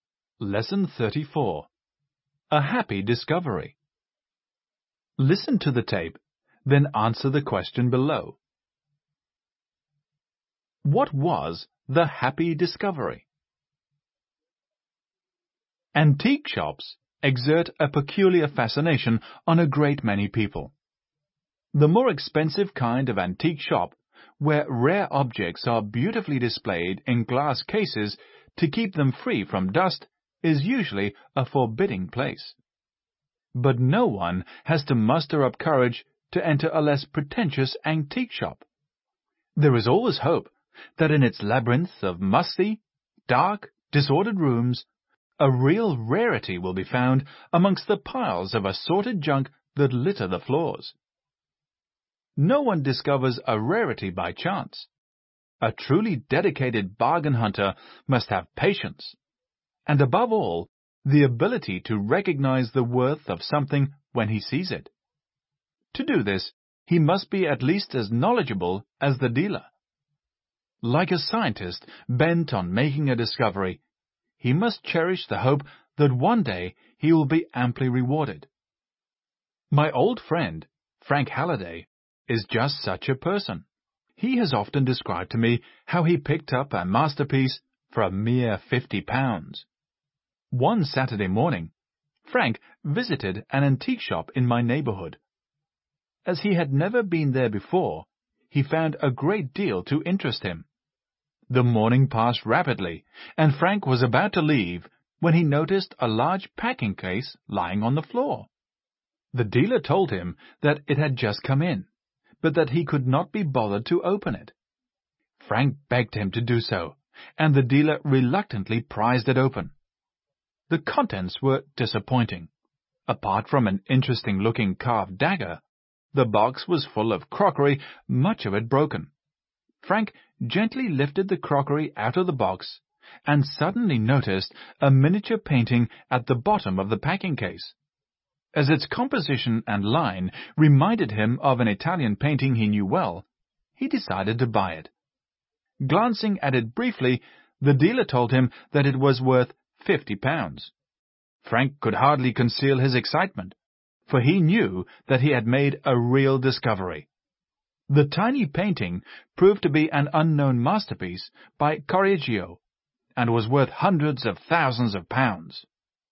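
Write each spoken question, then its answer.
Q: What was the happy discovery?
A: A miniature painting in a packing case that proved to be an unknown masterpiece by Correggio, bought for £50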